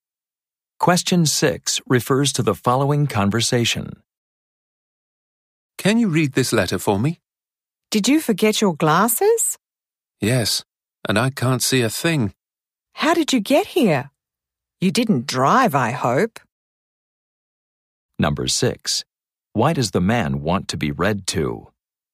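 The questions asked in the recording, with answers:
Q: Why does the man want to be read to?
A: He forgot his glasses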